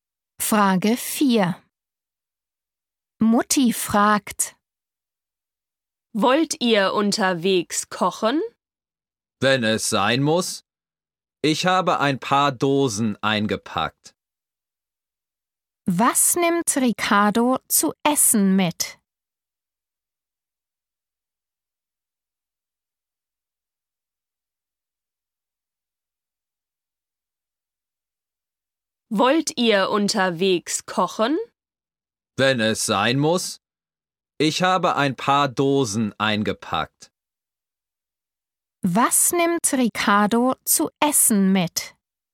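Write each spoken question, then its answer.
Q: Was nimmt Ricardo zu essen mit?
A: ein paar Dosen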